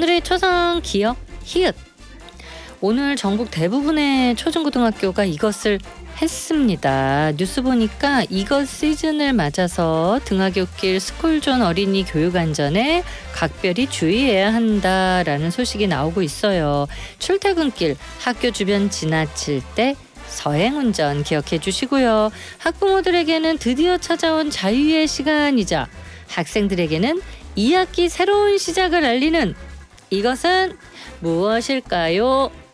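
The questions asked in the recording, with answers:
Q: 학부모들에게는 드디어 찾아온 자유의 시간이자 학생들에게는 2학기 새로운 시작을 알리는 이것은 무엇일까요?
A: 개학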